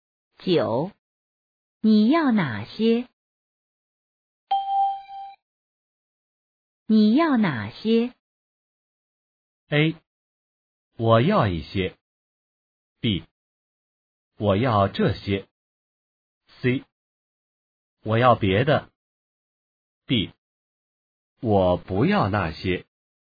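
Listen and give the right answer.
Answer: B: 我要这些。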